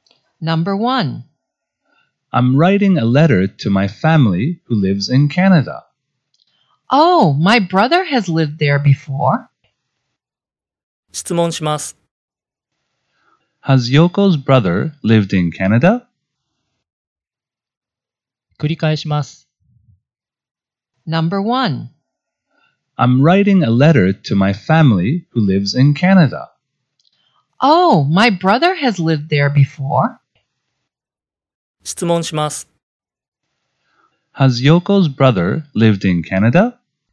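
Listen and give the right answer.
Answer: Yes, he has.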